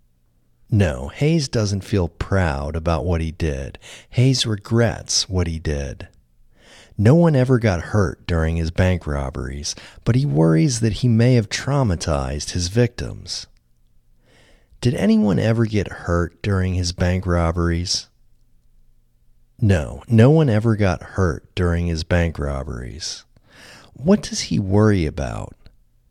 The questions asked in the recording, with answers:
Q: What does he worry about?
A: He worries that he may have traumatized his victims.